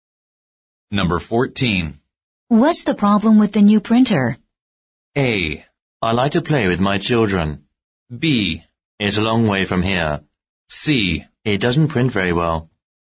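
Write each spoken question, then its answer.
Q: What's the problem with the new printer?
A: C: It doesn't print very well.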